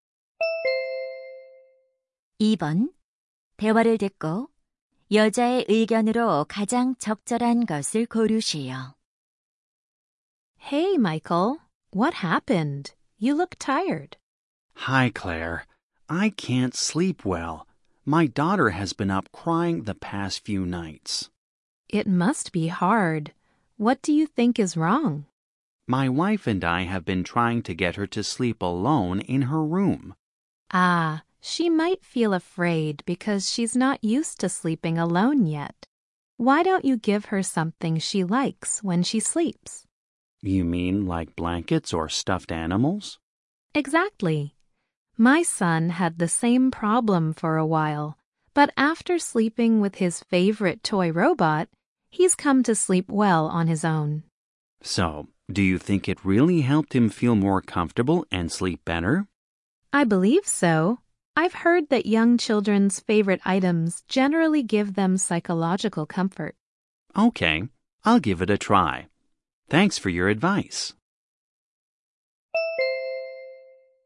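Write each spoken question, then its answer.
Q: 대화를 듣고 여자의 의견으로 가장 적절한 것을 고르시오.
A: 아이가 좋아하는 물건은 아이가 혼자 편안하게 자는 데 도움이 된다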